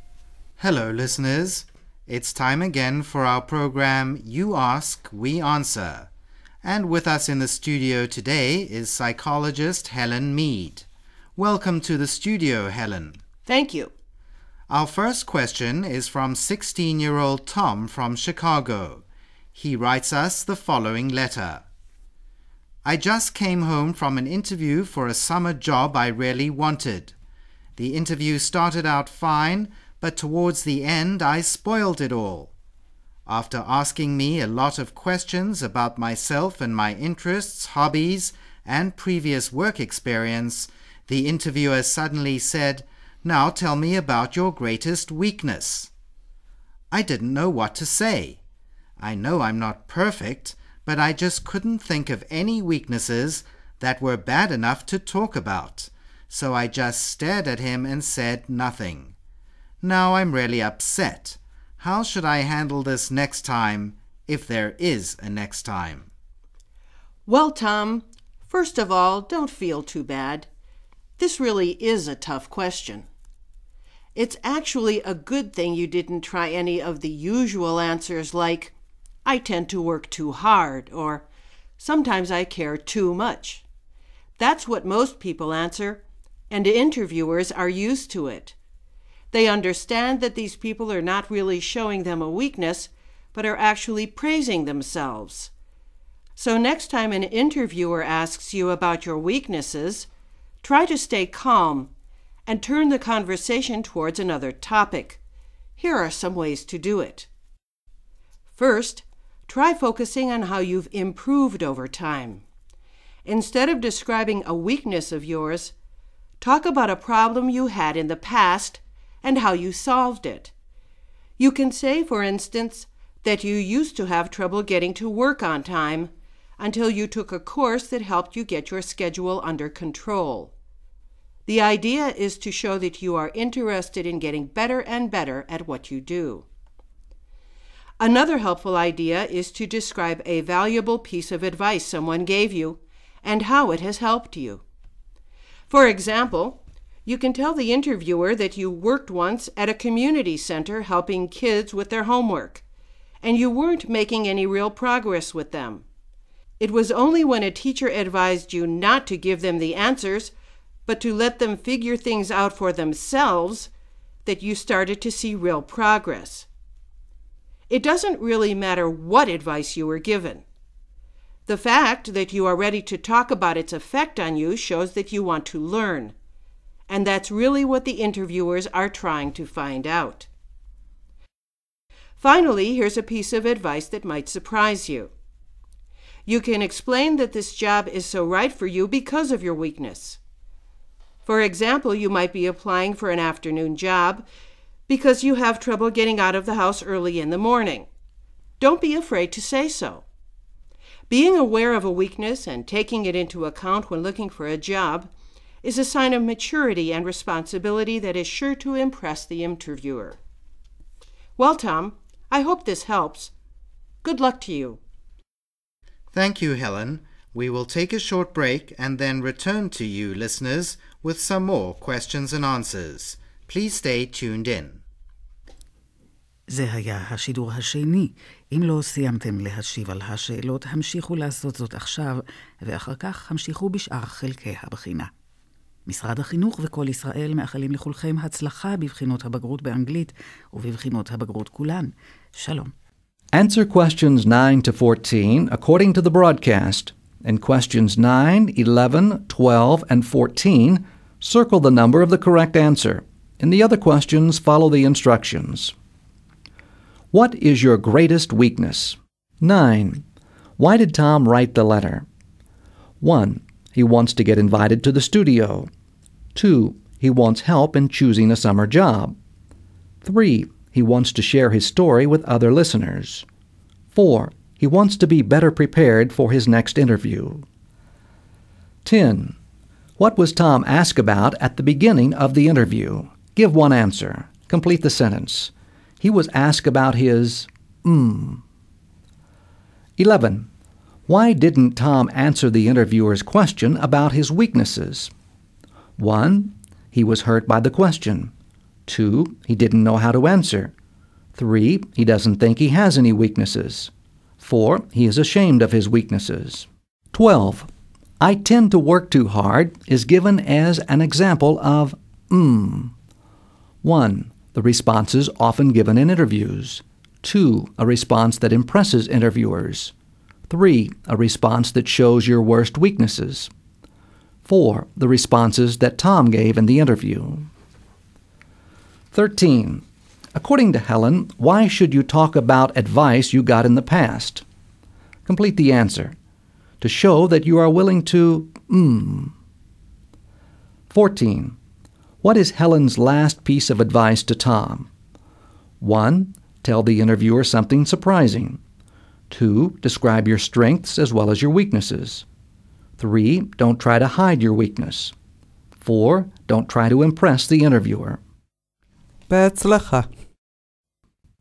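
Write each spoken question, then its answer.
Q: Why did Tom write the letter?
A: 4: He wants to be better prepared for his next interview.

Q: What was Tom asked about at the beginning of the interview?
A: His interests / hobbies / previous work experience

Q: Why didn't Tom answer the interviewer's question about his weaknesses?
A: 2: He didn't know how to answer.

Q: I tend to work too hard is given as an example of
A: 1: The responses often given in interviews.

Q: According to Helen, why should you talk about advice you got in the past?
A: To show that you are willing to learn

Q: What is Helen's last piece of advice to Tom?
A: 3: Don't try to hide your weakness.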